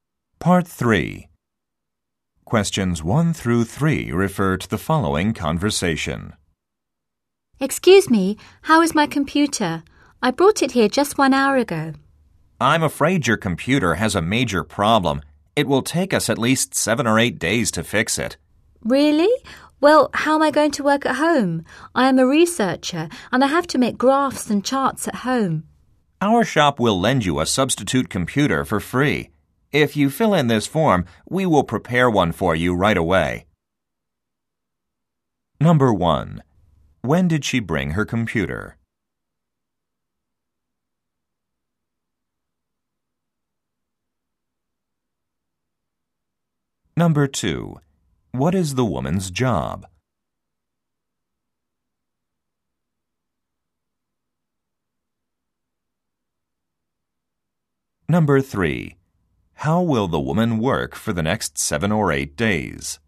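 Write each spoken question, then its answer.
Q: When did she bring her computer?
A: 1 hour ago

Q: What is the woman's job?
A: Researcher

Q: How will the woman work for the next 7 or 8 days?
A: With a substitute computer lent free by the shop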